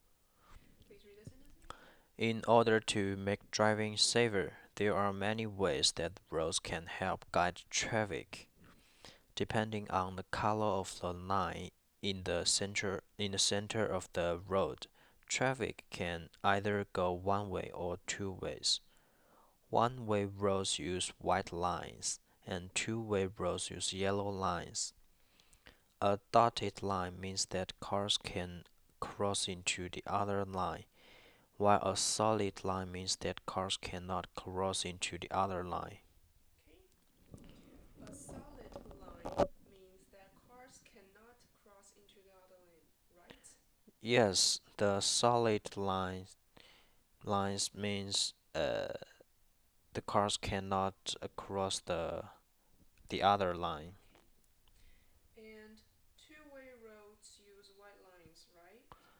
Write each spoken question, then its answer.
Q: A solid line means that cars cannot cross into the other lane, right?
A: Yes, the solid lines means the cars cannot cross the other line.

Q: And two-way roads use white lines, right?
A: No, two-way roads use yellow lines.